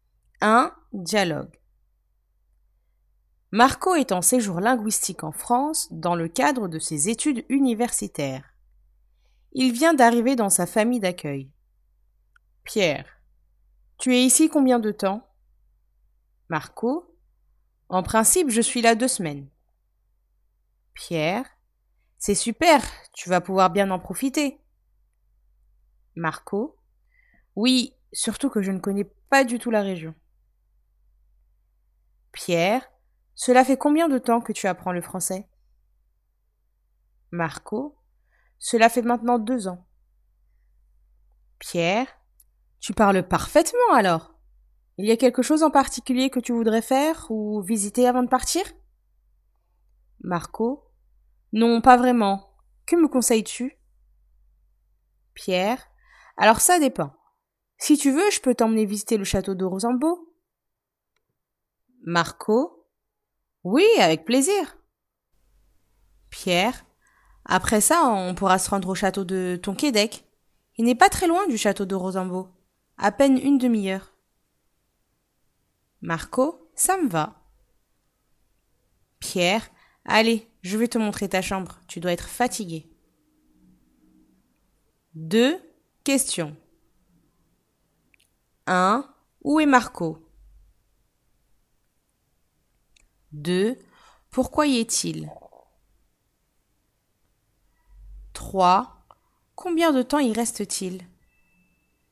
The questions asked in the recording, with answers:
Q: Où est Marco?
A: En France.

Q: Pourquoi y est-il?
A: Dans le cadre de son séjour linguistique.

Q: Combien de temps y reste-t-il?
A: Il y reste 2 semaines.